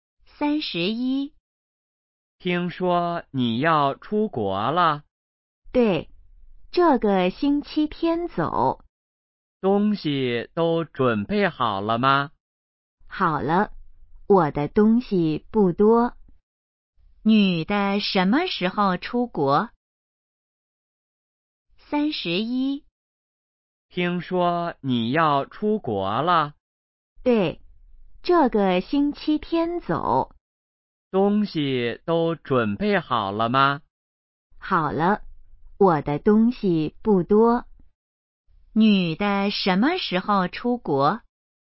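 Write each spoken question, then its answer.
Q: 女的什么时候出国?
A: 这个星期天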